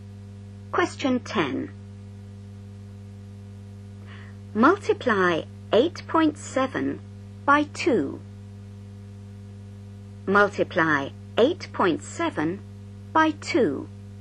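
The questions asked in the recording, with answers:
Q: Multiply 8.7 by 2.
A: 17.4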